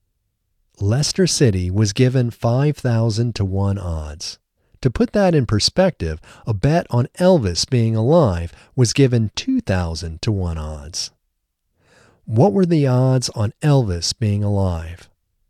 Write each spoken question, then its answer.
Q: What were the odds on Elvis being alive?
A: The odds on Elvis being alive was 2,000-1.